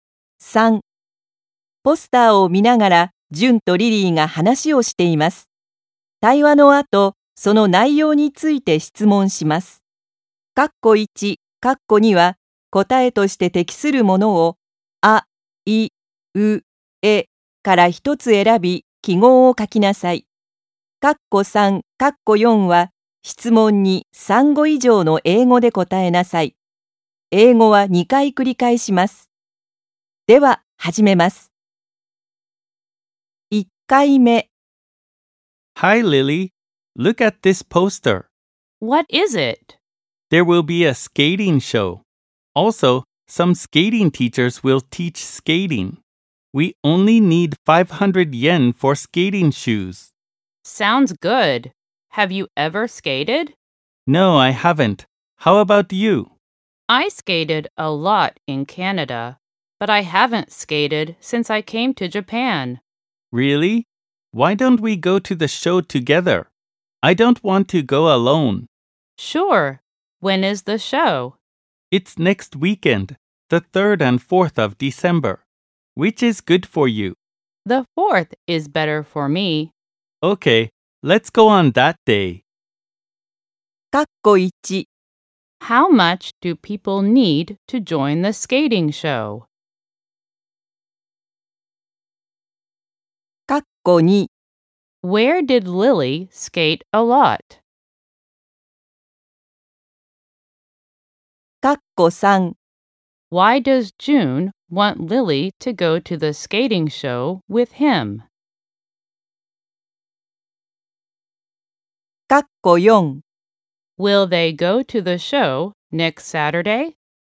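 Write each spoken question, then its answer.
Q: Where did Lily skate a lot?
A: In Canada

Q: Why does June want Lily to go to the skating show with him?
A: Because he doesn't want to go alone.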